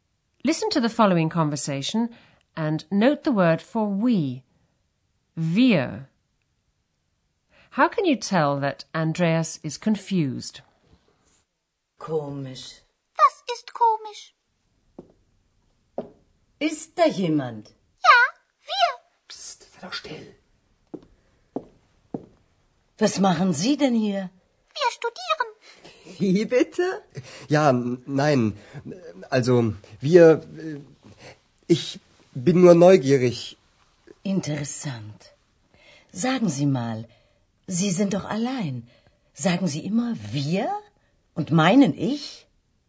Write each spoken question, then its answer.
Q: How can you tell that Andreas is confused?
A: He begins to stutter.